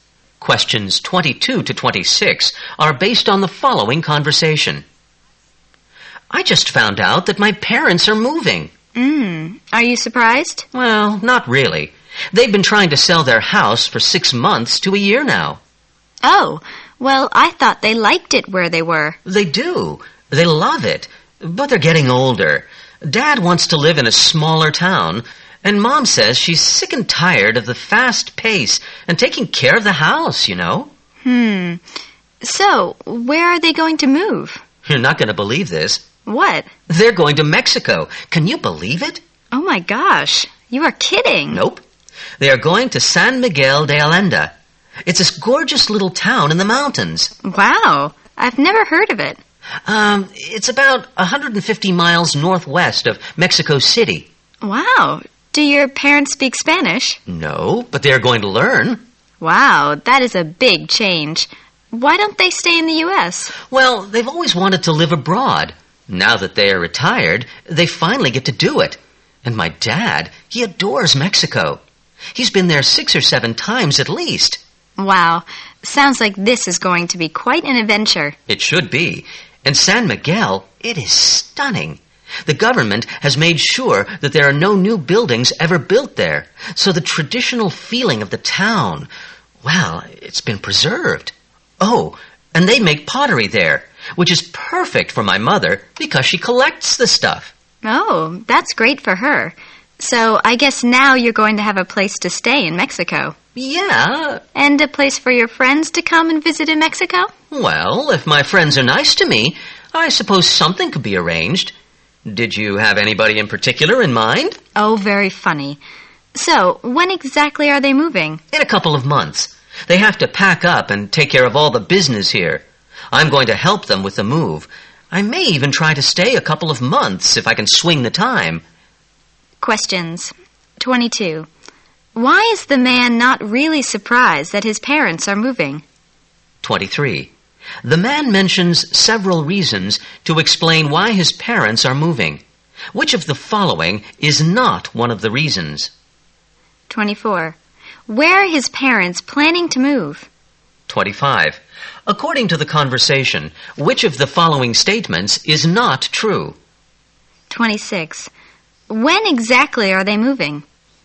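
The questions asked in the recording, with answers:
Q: Why is the man not really surprised that his parents are moving?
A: They've been trying to sell their house for six months to a year

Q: Where are his parents planning to move?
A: San Miguel de Allende, Mexico

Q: When exactly are they moving?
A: In a couple of months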